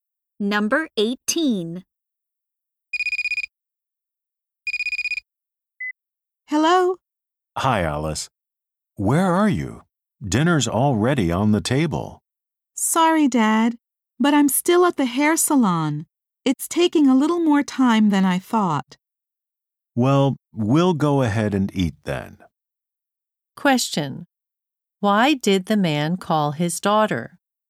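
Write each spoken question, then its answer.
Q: Why did the man call his daughter?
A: Dinner was ready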